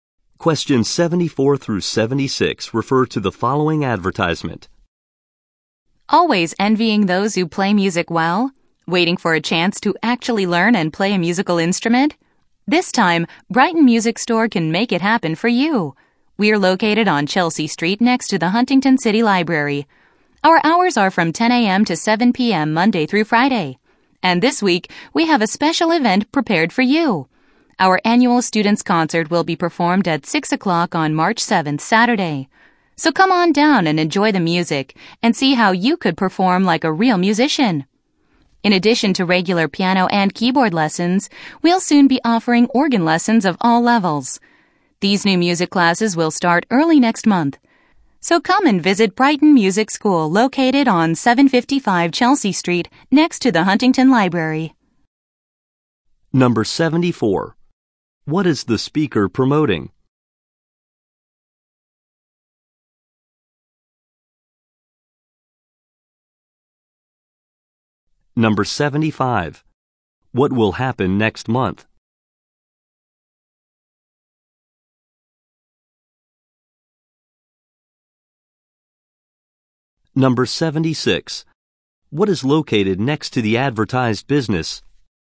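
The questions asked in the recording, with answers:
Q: What is the speaker promoting?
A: A music store/school.

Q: What will happen next month?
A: Organ lessons will start.

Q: What is located next to the advertised business?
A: The Huntington City Library.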